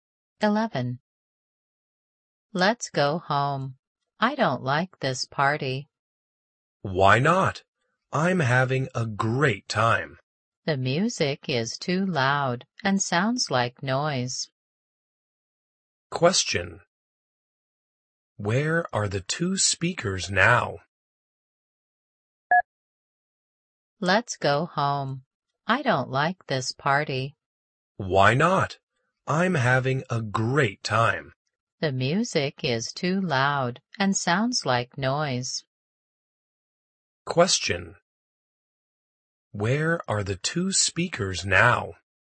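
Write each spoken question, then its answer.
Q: Where are the two speakers now?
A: At a party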